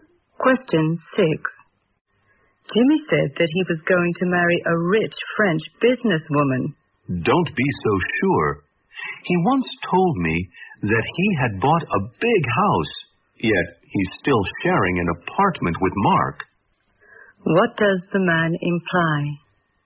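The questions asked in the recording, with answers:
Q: What does the man imply?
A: Jimmy's words can't be trusted.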